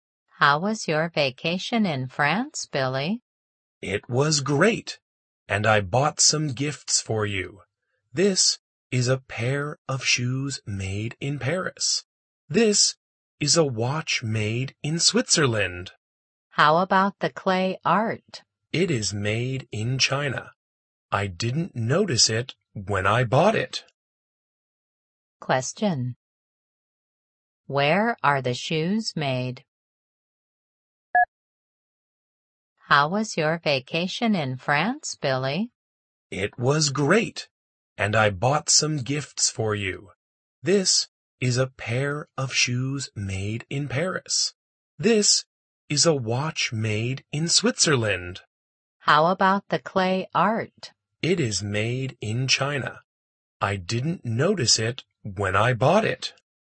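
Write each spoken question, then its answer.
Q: Where are the shoes made?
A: In Paris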